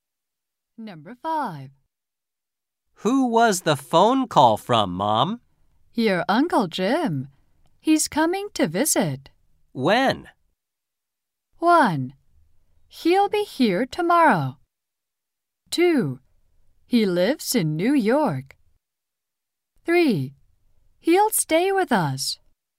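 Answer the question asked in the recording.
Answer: 1: He'll be here tomorrow.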